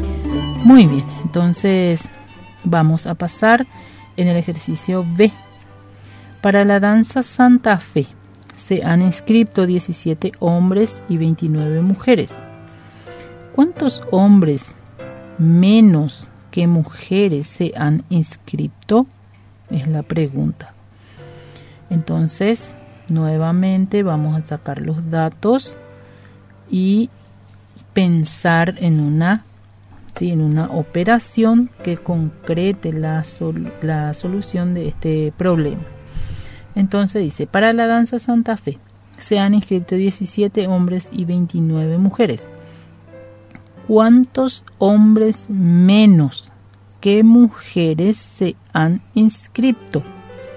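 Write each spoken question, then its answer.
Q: ¿Cuántos hombres menos que mujeres se han inscrito?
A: 12 hombres menos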